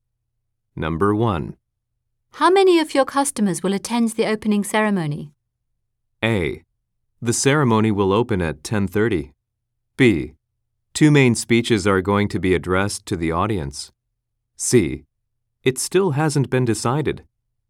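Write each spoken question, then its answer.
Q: How many of your customers will attend the opening ceremony?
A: C: It still hasn't been decided.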